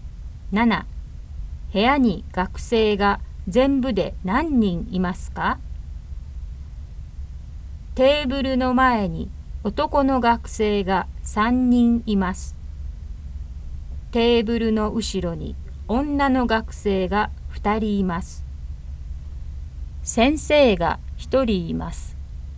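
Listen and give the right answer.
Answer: 5人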